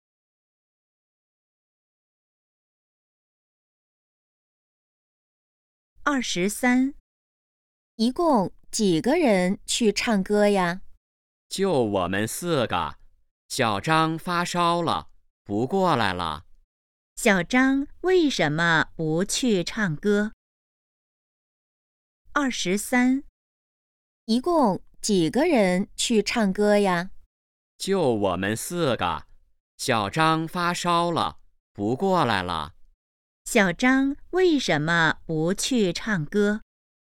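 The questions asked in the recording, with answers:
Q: 小张为什么不去唱歌?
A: 发烧了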